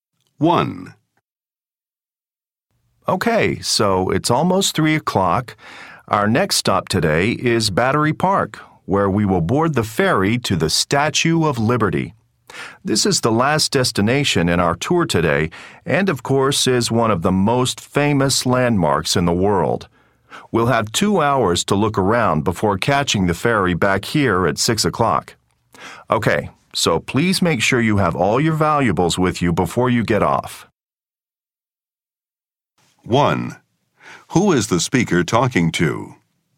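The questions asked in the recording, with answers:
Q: Who is the speaker talking to?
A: Tourists on a tour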